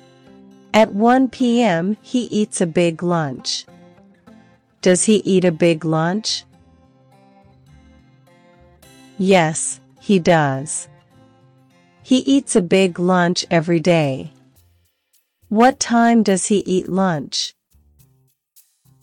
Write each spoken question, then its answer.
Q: What time does he eat lunch?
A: At 1 p.m. He eats lunch at 1 o'clock in the afternoon.